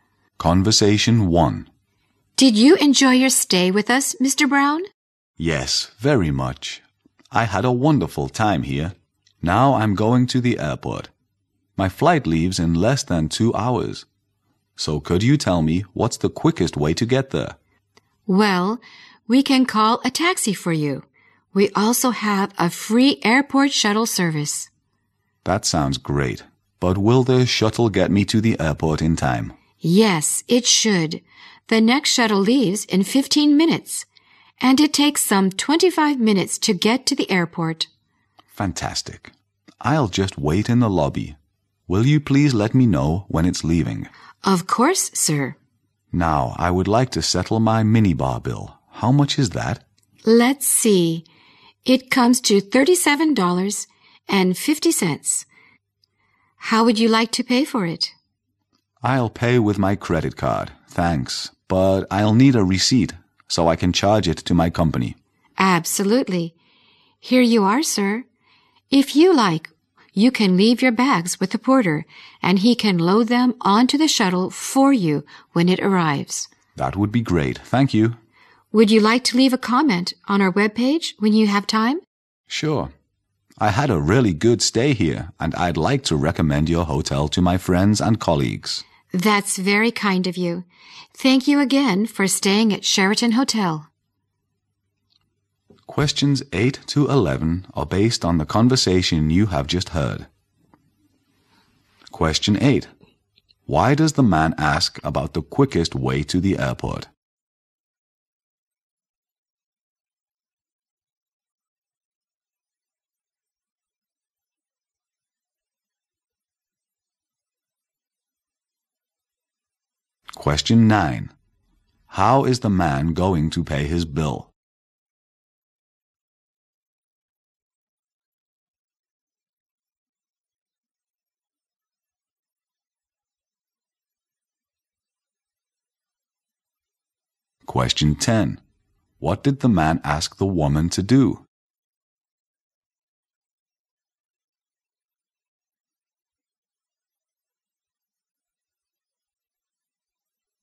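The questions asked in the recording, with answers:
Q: Why does the man ask about the quickest way to the airport?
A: His flight leaves in less than 2 hours

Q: How is the man going to pay his bill?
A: With his credit card

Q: What did the man ask the woman to do?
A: Let him know when the shuttle is leaving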